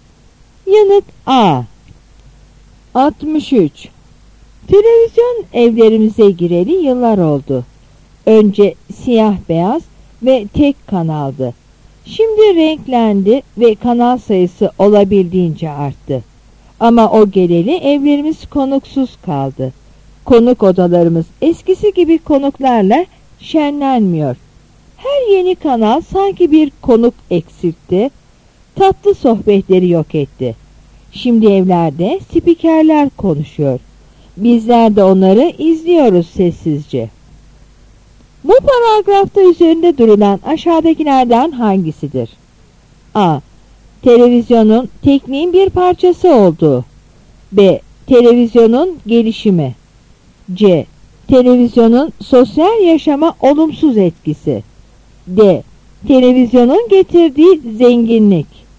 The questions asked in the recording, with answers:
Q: Bu paragrafta üzerinde durulan aşağıdakilerden hangisidir?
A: Yanıt C.